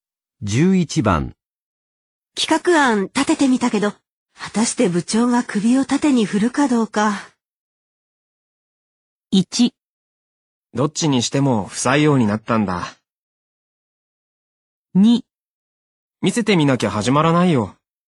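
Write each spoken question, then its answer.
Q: たして部長が首を縦に振るかどうか。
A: 2: 見せてみなきゃ始まらないよ。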